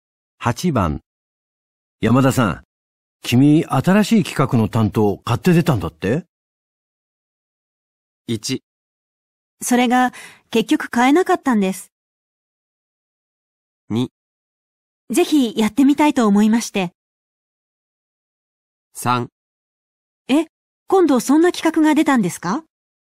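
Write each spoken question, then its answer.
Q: 山田さん、君、新しい企画の担当、買って出たんだって?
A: 2: ぜひ、やってみたいと思いまして。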